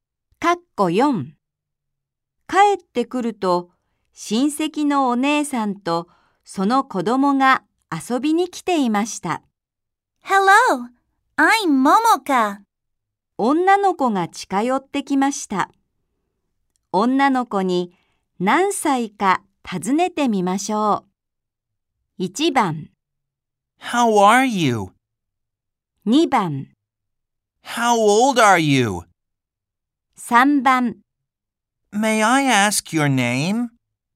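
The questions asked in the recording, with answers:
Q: 女の子に何歳か尋ねてみましょう。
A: 2: How old are you?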